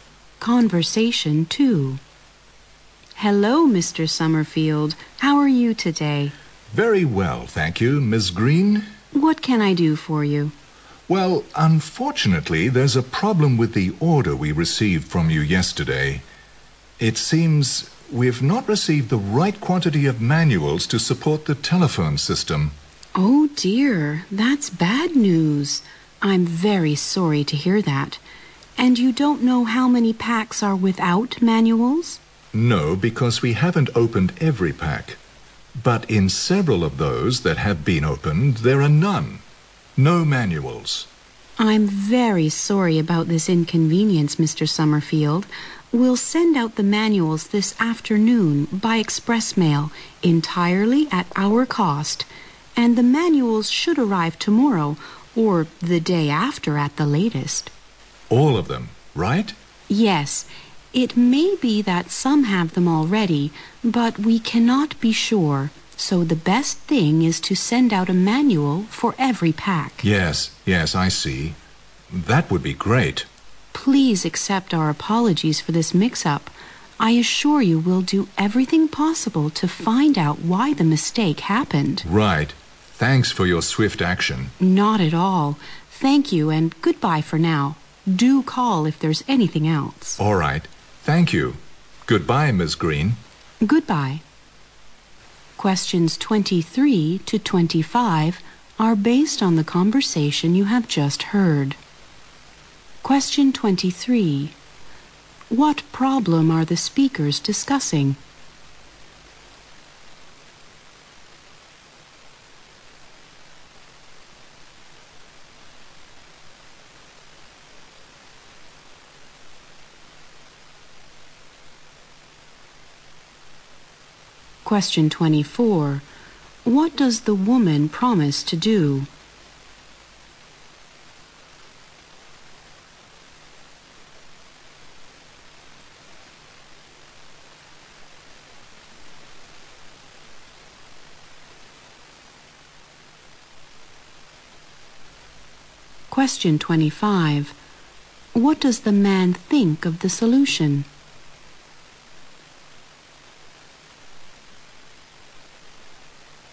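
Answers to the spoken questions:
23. Some packs were delivered without manuals.
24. Send a manual for every pack by express mail, at her company's cost.
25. He thinks it's great and thanks her for acting quickly.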